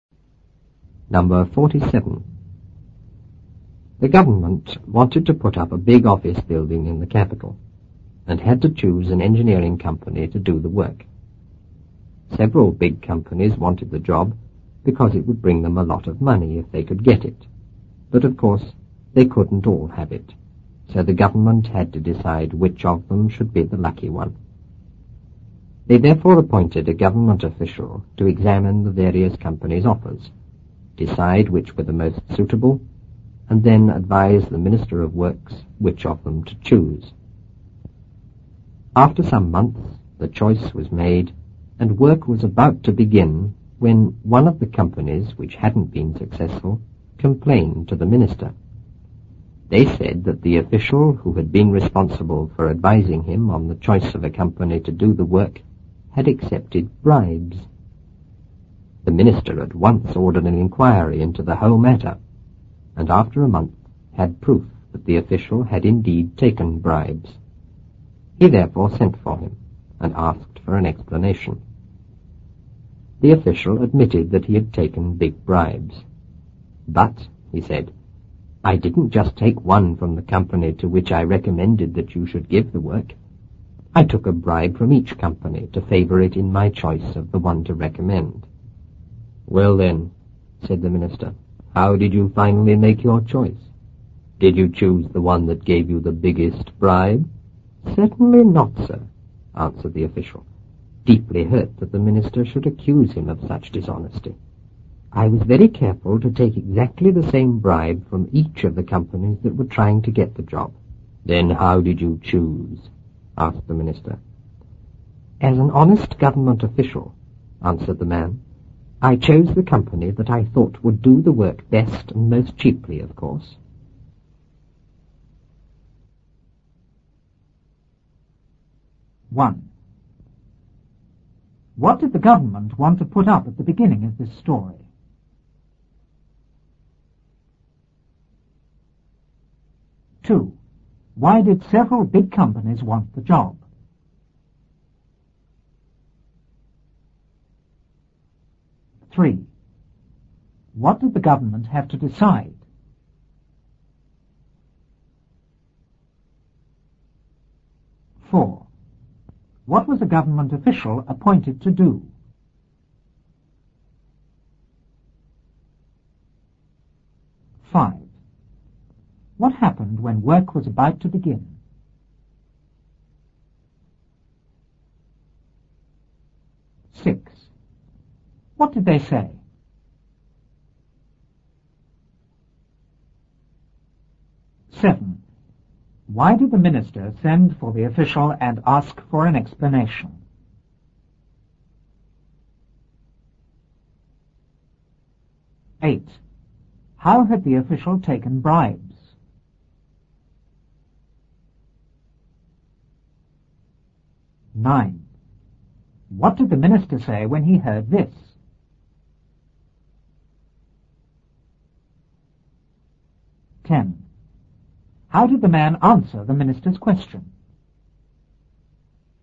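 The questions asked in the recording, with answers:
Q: What did the government want to put up at the beginning of this story?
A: A big office building in the capital

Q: Why did several big companies want the job?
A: Because it would bring them a lot of money

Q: What did the government have to decide?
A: Which company should get the job

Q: What was a government official appointed to do?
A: Examine the companies' offers, decide which were most suitable, and advise the Minister of Works which to choose

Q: What happened when work was about to begin?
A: One of the unsuccessful companies complained to the minister

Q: What did they say?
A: That the official responsible for advising him had accepted bribes

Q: Why did the minister send for the official and ask for an explanation?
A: Because an inquiry proved the official had taken bribes

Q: How had the official taken bribes?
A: He took exactly the same bribe from each company trying to get the job

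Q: What did the minister say when he heard this?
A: He asked how he finally made his choice, and whether he chose the one that gave the biggest bribe

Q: How did the man answer the minister's question?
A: He chose the company he thought would do the work best and most cheaply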